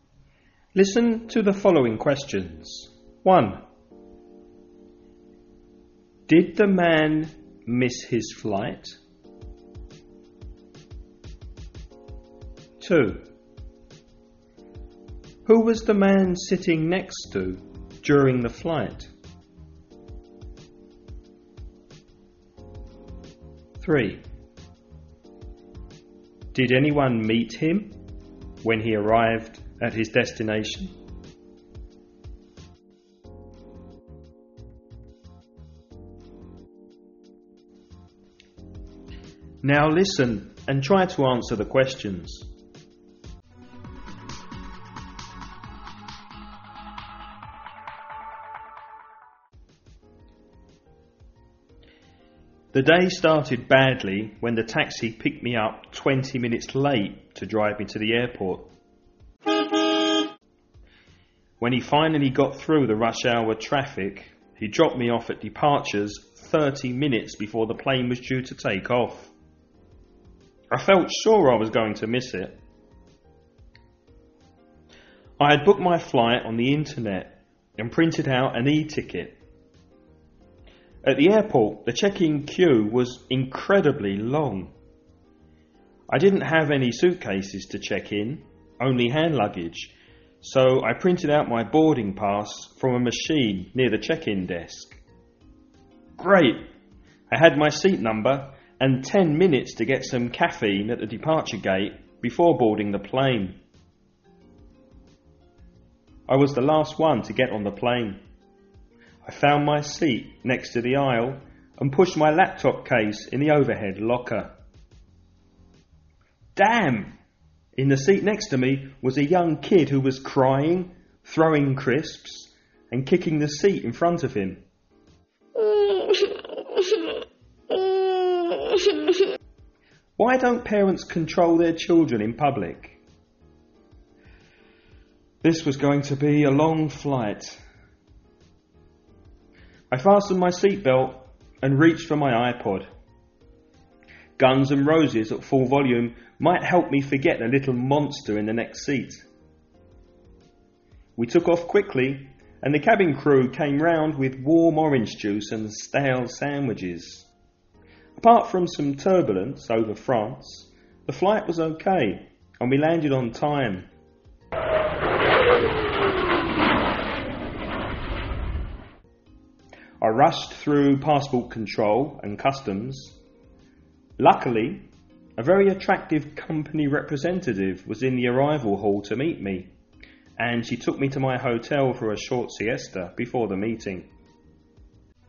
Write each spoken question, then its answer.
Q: Did the man miss his flight?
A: No. He didn't.

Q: Who was the man sitting next to during the flight?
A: A young child.

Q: Did anyone meet him when he arrived at his destination?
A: Yes, an attractive company representative.